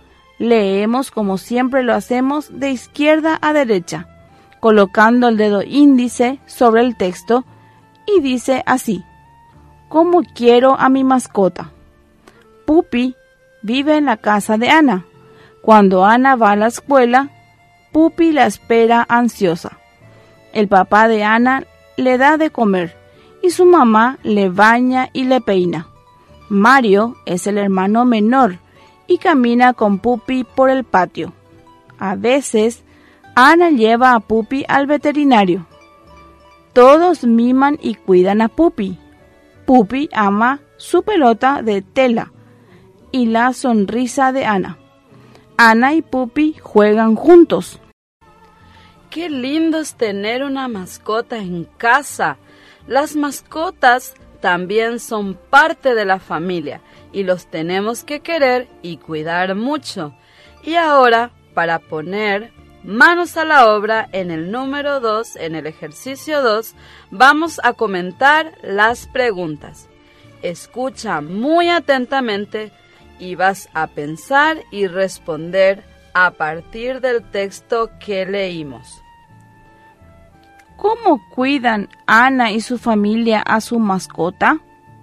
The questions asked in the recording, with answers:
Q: ¿Cómo cuidan Ana y su familia a su mascota?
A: Ellos le dan de comer, le bañan y le peinan.